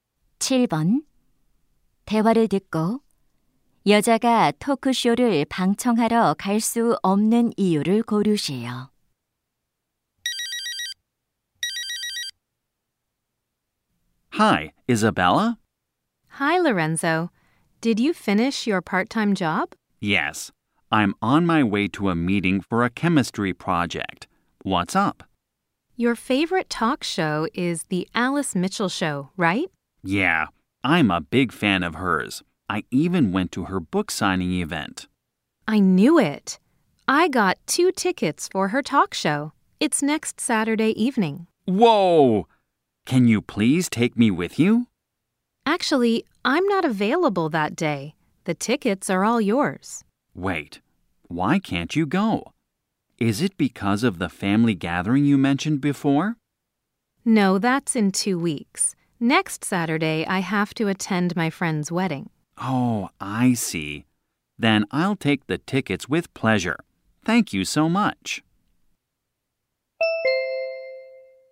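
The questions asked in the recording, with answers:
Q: 대화를 듣고 여자가 토크쇼를 방청하러 갈 수 없는 이유를 고르세요.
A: 친구 결혼식에 참석해야 해서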